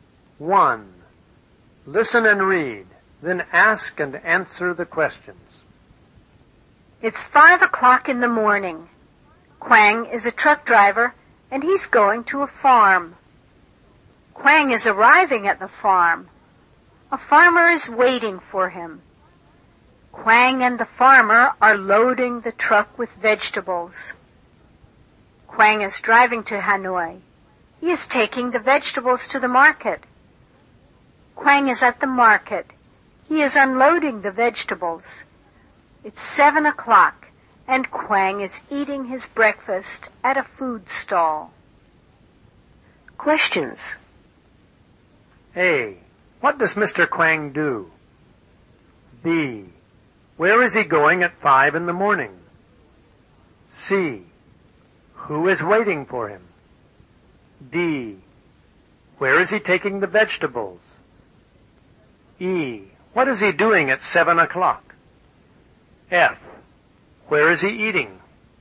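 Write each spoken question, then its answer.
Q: What does Mr. Quang do?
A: He is a truck driver.

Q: Where is he going at 5 in the morning?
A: He's going to a farm.

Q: Who is waiting for him?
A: A farmer.

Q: Where is he taking the vegetables?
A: To the market in Hanoi.

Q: What is he doing at 7 o'clock?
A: He is eating his breakfast.

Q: Where is he eating?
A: At a food stall.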